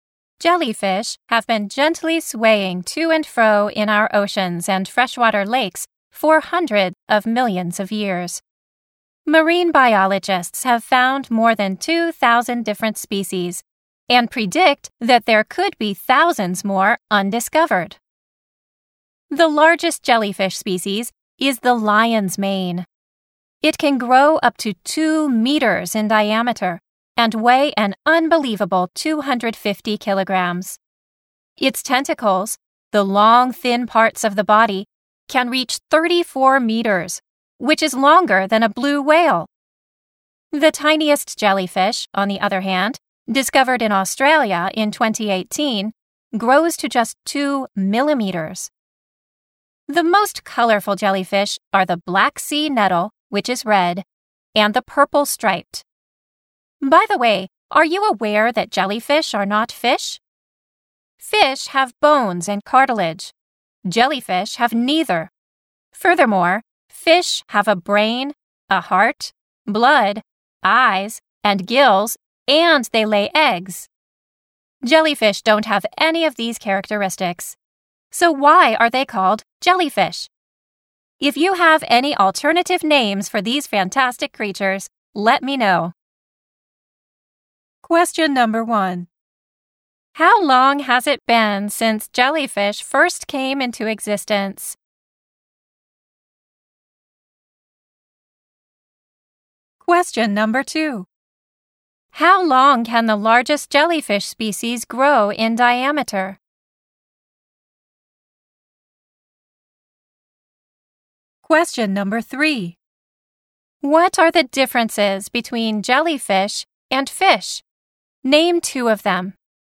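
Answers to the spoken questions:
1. Hundreds of millions of years.
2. Up to 2 meters.
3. Fish have bones and cartilage, but jellyfish have neither; fish have a brain and a heart, but jellyfish don't.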